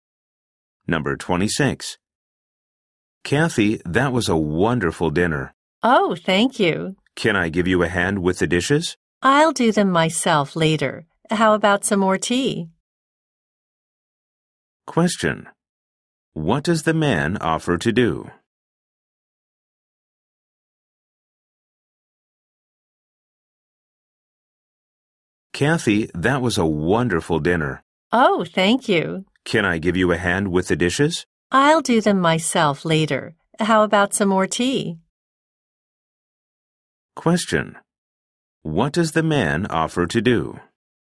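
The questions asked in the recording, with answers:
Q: What does the man offer to do?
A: Help wash the dishes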